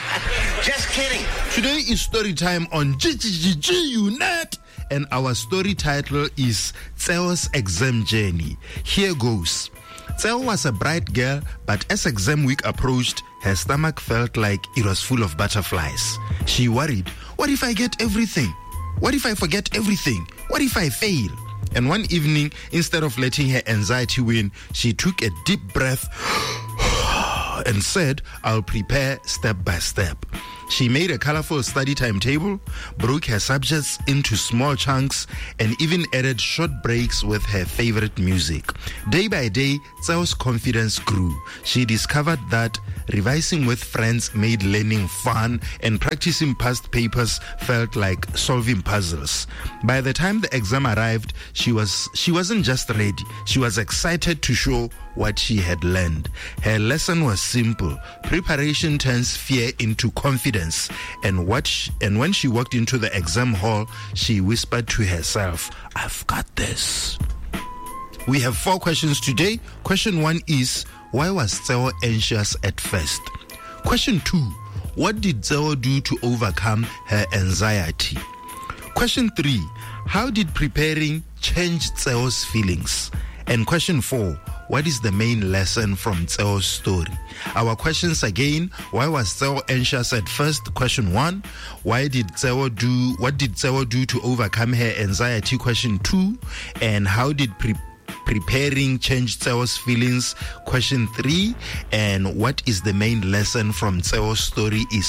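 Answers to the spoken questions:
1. Exam week was coming and she worried she would forget everything and fail
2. She prepared step by step: made a study timetable, broke subjects into small chunks, took breaks with music, revised with friends and practised past papers
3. Her confidence grew and she became excited instead of afraid
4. Preparation turns fear into confidence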